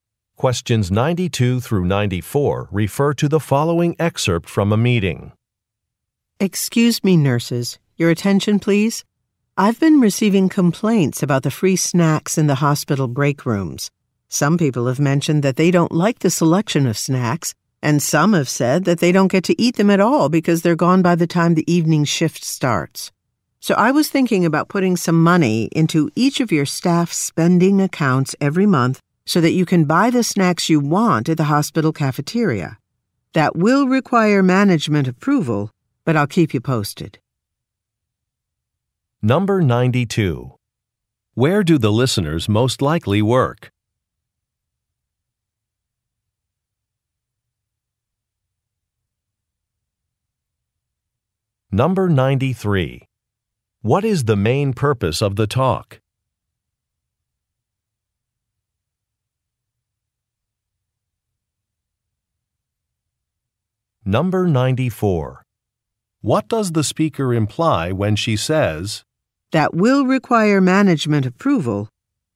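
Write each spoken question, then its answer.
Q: Where do the listeners most likely work?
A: At a hospital

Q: What is the main purpose of the talk?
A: To address complaints about the free snacks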